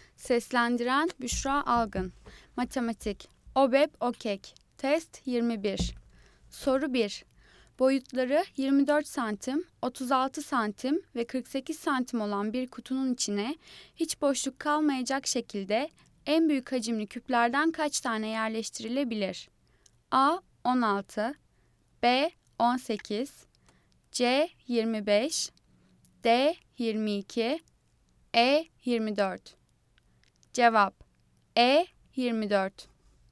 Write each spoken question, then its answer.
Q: Boyutları 24 cm, 36 cm ve 48 cm olan bir kutunun içine hiç boşluk kalmayacak şekilde en büyük hacimli küplerden kaç tane yerleştirilebilir?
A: E. 24.